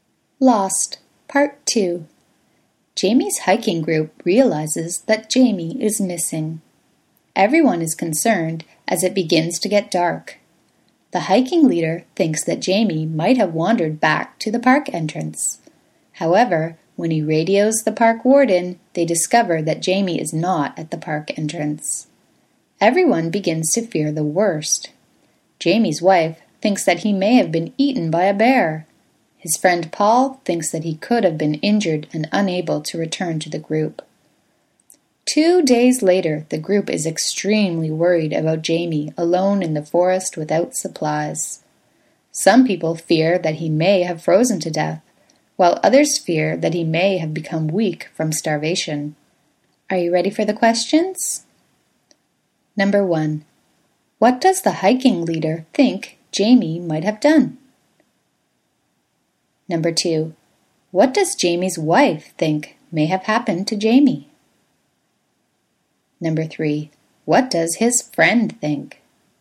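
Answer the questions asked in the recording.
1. Wandered back to the park entrance.
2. He may have been eaten by a bear.
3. He could have been injured and unable to return to the group.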